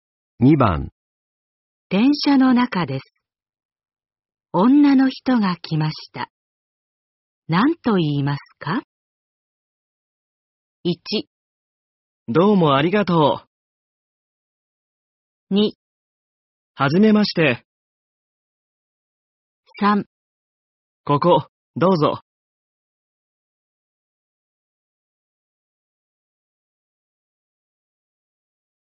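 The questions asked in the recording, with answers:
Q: 電車の中です。女の人が来ました。何と言いますか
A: 3: ここ、どうぞ。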